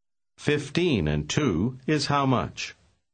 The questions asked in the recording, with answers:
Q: 15 and 2 is how much?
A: 17.